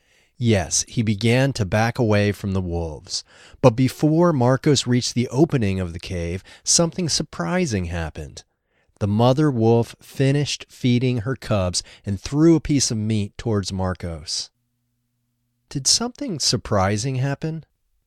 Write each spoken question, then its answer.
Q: Did something surprising happen?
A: Yes, something surprising happened.